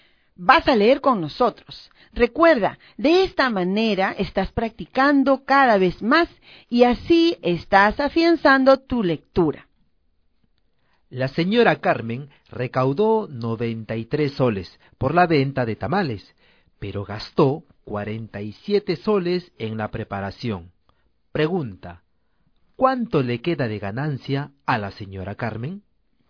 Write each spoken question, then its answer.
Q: Pregunta, ¿cuánto le queda de ganancia a la señora Carmen?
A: En este caso, a la señora Carmen le queda de ganancia 46 soles.